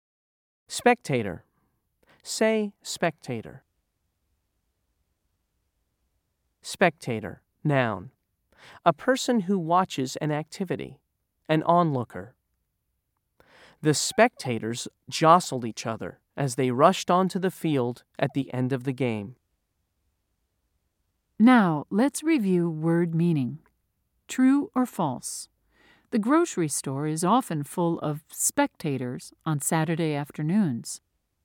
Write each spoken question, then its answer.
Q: True or false? The grocery store is often full of spectators on Saturday afternoons.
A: If you said false, you were right.